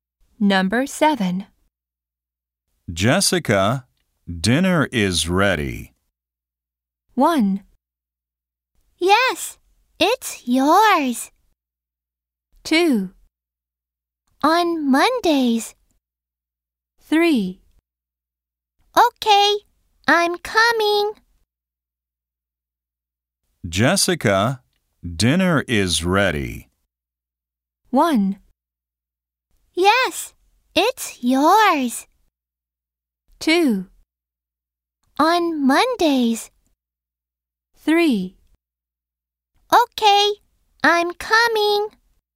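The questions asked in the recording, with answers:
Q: Jessica, dinner is ready.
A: 3: Okay, I'm coming.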